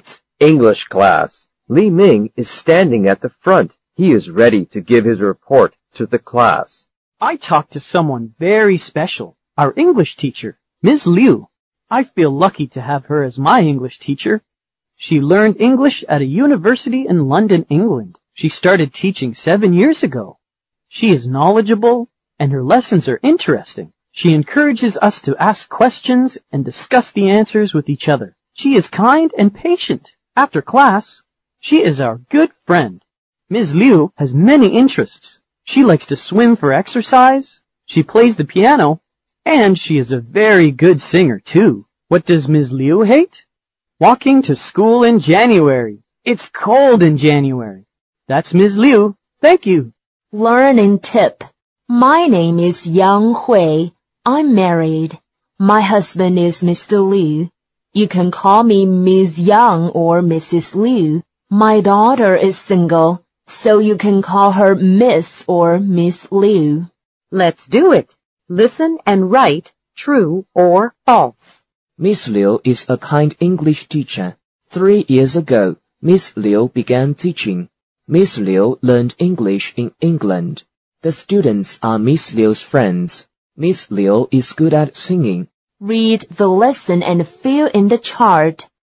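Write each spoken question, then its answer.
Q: Miss Liu is a kind English teacher.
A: True

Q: 3 years ago, Miss Liu began teaching.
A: False

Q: Miss Liu learned English in England.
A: True

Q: Miss Liu is good at singing.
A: True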